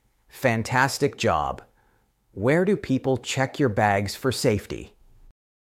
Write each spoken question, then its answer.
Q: Where do people check your bags for safety?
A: At security.